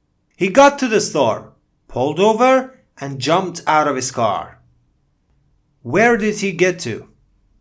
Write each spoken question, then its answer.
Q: Where did he get to?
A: The store, right?